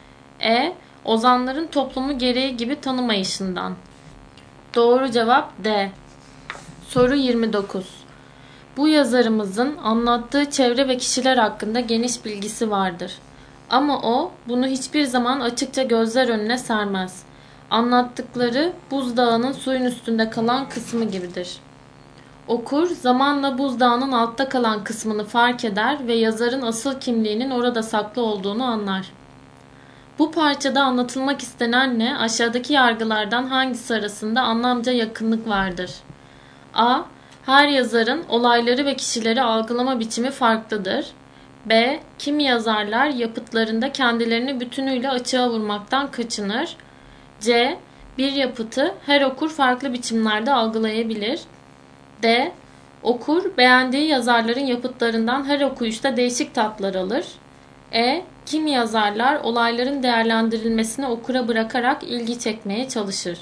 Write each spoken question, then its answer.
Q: Bu parçada anlatılmak istenenle aşağıdaki yargılardan hangisi arasında anlamca yakınlık vardır?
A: Doğru cevap B.